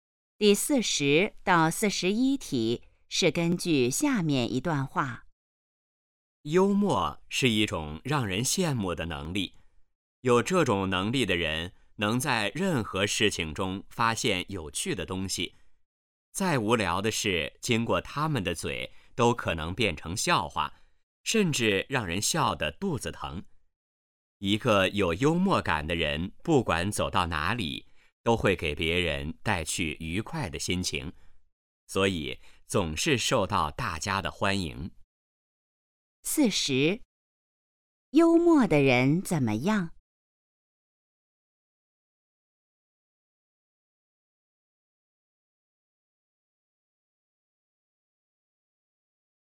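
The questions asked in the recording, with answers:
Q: 幽默的人怎么样?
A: 能在任何事情中发现有趣的东西

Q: 幽默的人为什么受欢迎?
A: 给别人带去愉快的心情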